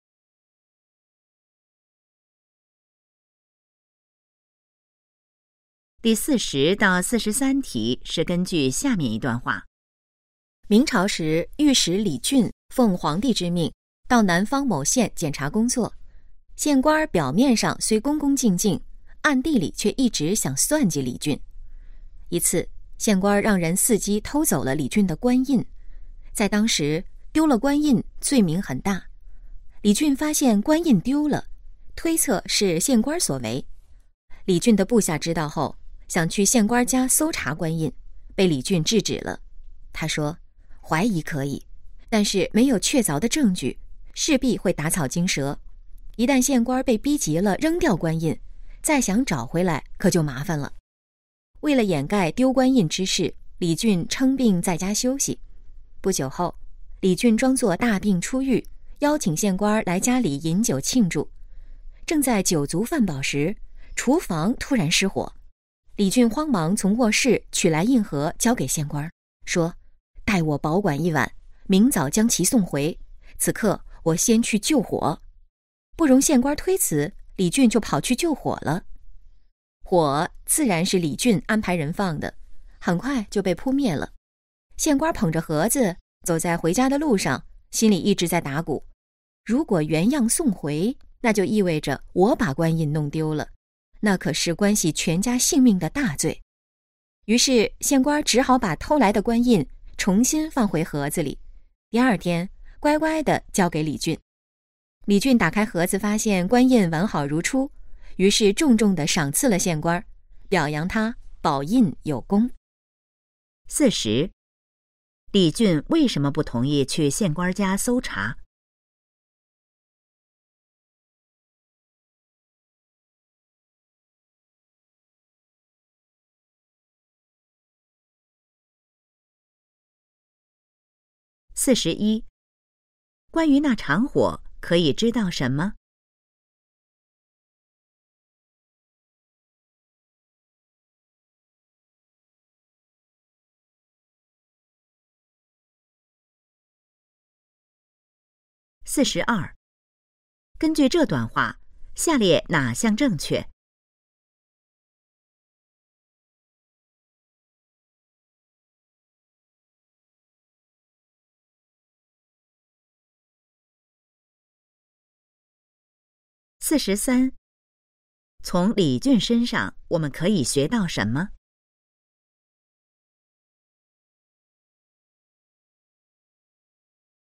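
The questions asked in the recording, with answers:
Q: 李俊为什么不同意去县官家搜查?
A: 没有确凿证据,会打草惊蛇

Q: 关于那场火可以知道什么?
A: 是李俊安排人放的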